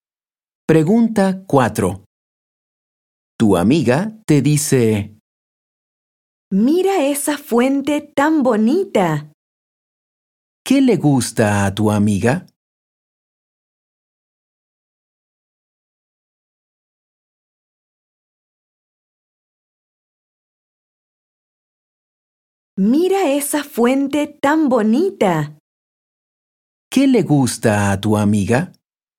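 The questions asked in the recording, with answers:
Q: ¿Qué le gusta a tu amiga?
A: la fuente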